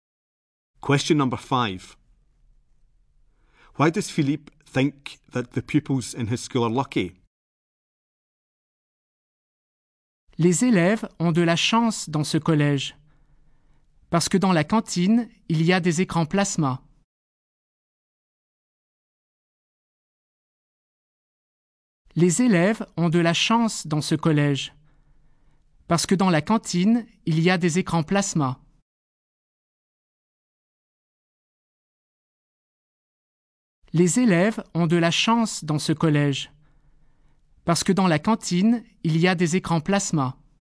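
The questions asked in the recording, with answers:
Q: Why does Philippe think that the pupils in his school are lucky?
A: There are plasma screens in the canteen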